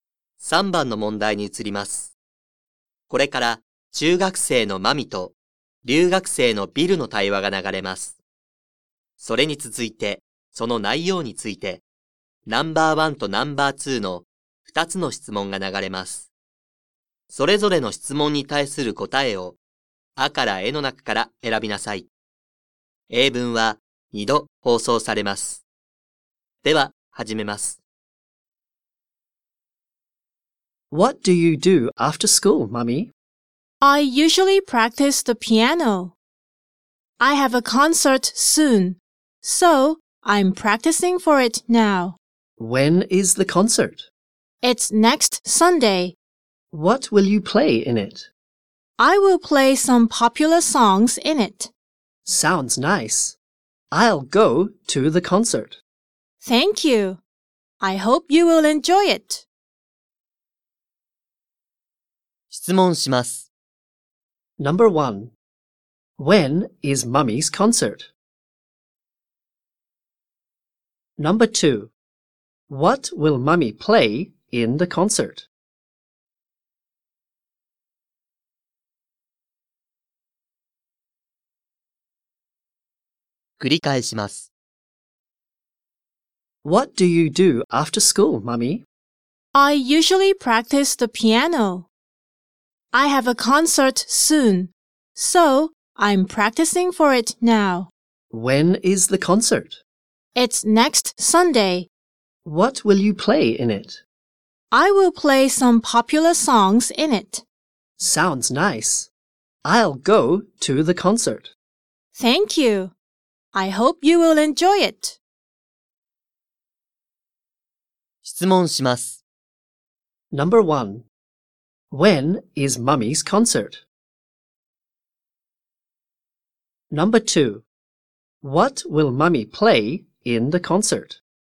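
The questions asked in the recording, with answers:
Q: When is Mummy's concert?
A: Next Sunday.

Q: What will Mummy play in the concert?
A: Some popular songs.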